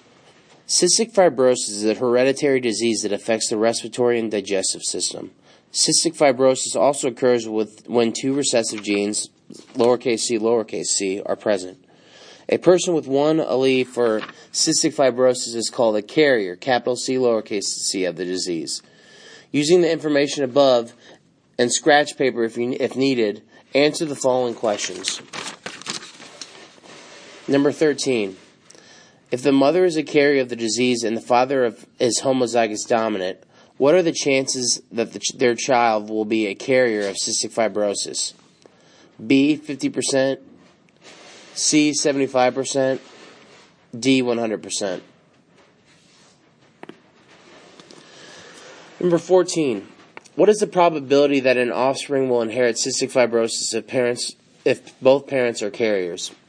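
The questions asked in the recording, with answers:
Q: If the mother is a carrier of the disease and the father is homozygous dominant, what are the chances that their child will be a carrier of cystic fibrosis?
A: B: 50%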